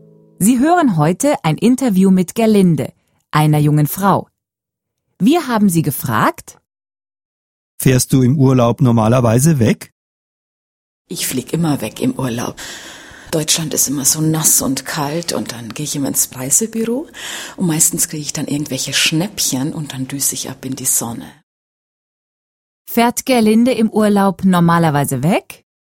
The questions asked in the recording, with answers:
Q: Fährt Gerlinde im Urlaub normalerweise weg?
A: Ja, Gerlinde fährt immer im Urlaub weg.